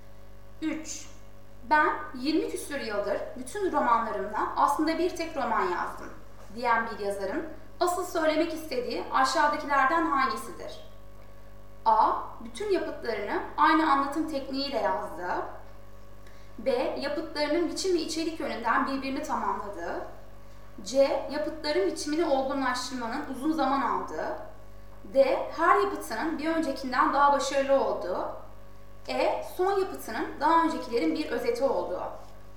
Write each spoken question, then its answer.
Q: Ben 20 küsur yıldır bütün romanlarımla aslında bir tek roman yazdım diyen bir yazarın asıl söylemek istediği aşağıdakilerden hangisidir?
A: Doğru yanıt B.